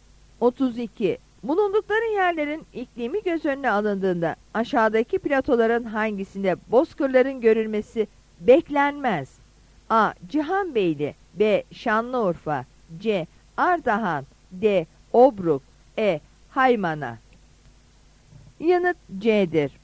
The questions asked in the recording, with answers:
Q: Bulundukları yerlerin iklimi göz önüne alındığında aşağıdaki platoların hangisinde bozkırların görülmesi beklenmez?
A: Yanıt C'dir.